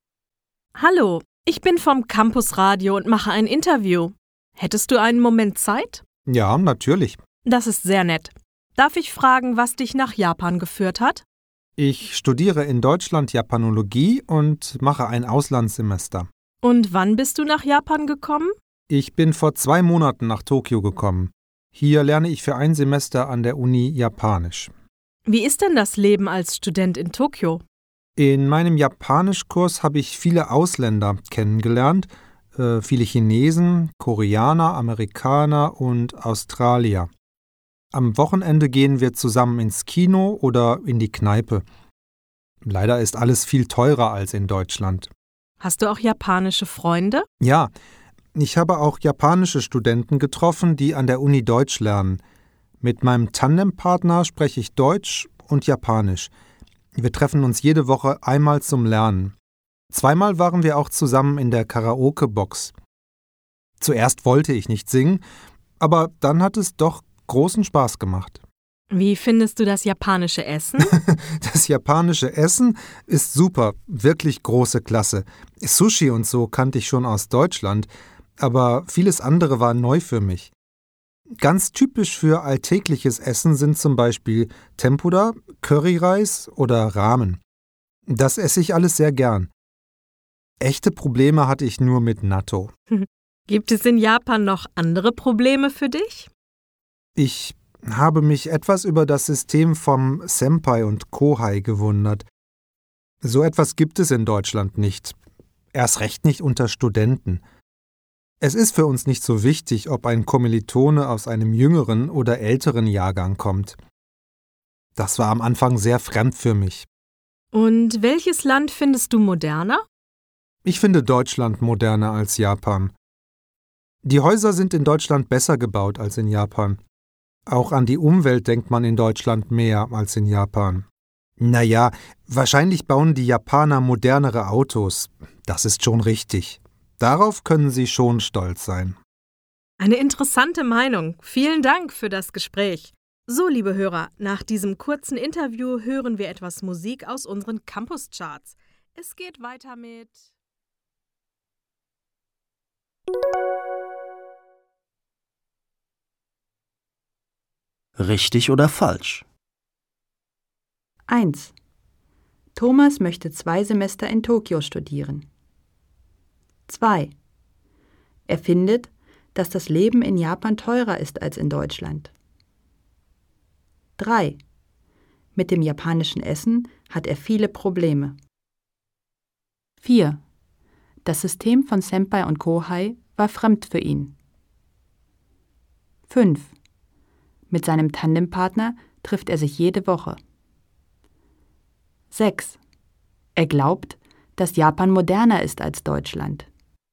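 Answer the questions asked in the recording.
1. falsch
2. richtig
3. falsch
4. richtig
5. richtig
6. falsch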